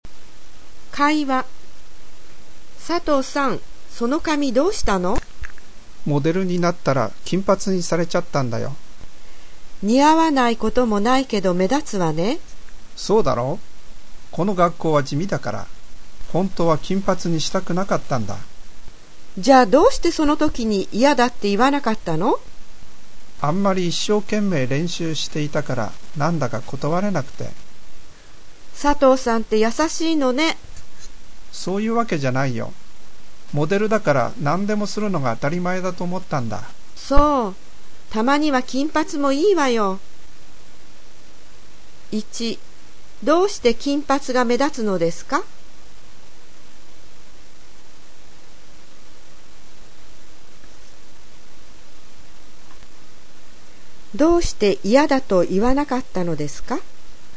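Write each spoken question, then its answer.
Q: どうして金髪が目立つのですか?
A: 学校が地味だから

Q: どうして嫌だと言わなかったのですか?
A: 相手があんまり一生懸命練習していたので、断れなかったから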